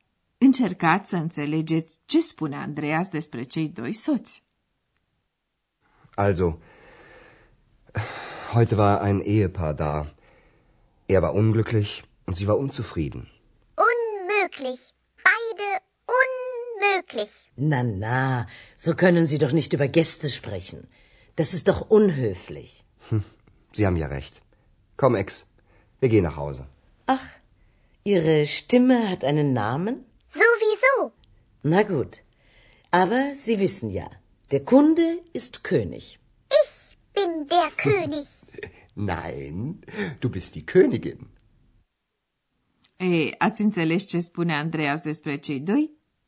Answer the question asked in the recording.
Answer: Spune că bărbatul e nefericit, iar femeia nemulțumită.